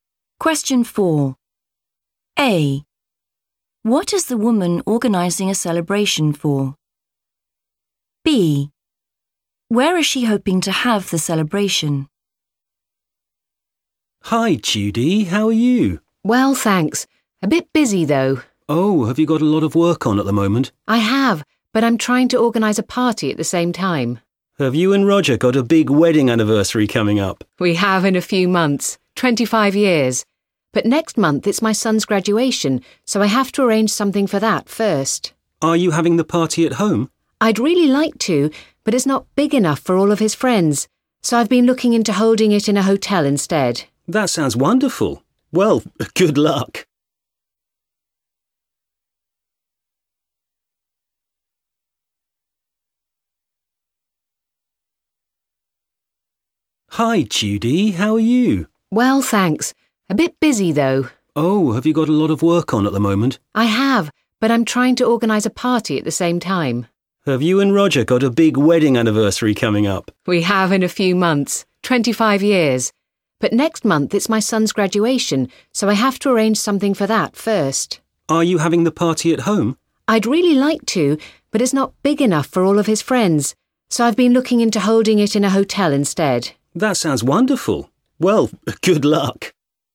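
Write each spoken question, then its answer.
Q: What is the woman organising a celebration for?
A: her son's graduation

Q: Where is she hoping to have the celebration?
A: in a hotel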